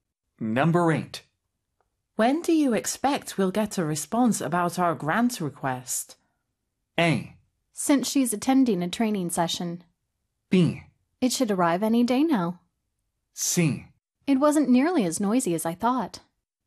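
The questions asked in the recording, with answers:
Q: When do you expect we'll get a response about our grant request?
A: B: It should arrive any day now.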